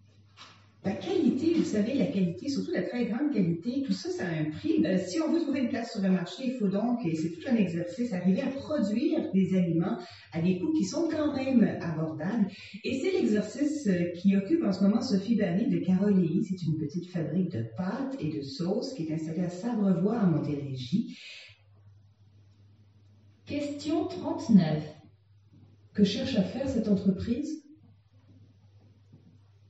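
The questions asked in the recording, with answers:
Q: Que cherche à faire cette entreprise?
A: Produire des aliments de qualité à des coûts abordables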